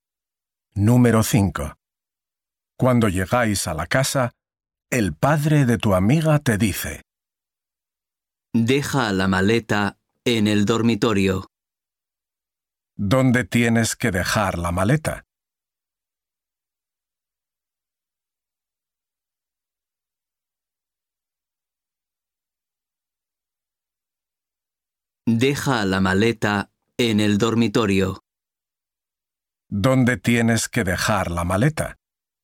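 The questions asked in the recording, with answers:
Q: ¿Dónde tienes que dejar la maleta?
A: en el dormitorio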